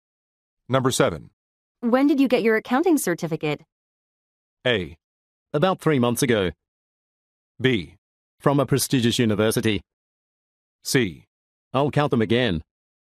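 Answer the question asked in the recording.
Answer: A: About 3 months ago.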